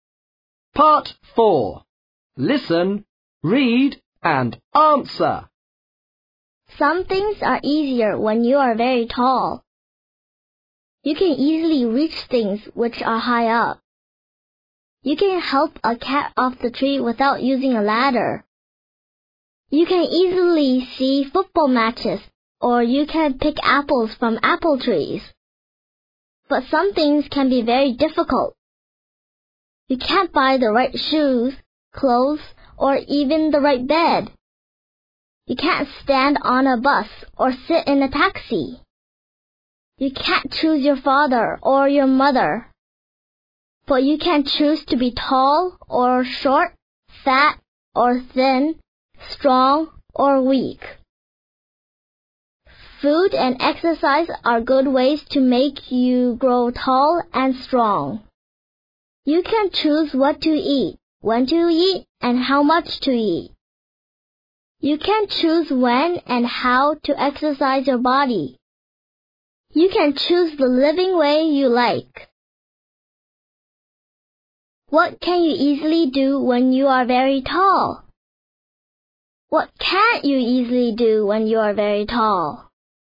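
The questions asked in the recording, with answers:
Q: What can you easily do when you are very tall?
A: Reach things which are high up, help a cat off a tree without a ladder, see football matches, pick apples from trees

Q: What can't you easily do when you are very tall?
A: Buy the right shoes, clothes or bed; stand on a bus or sit in a taxi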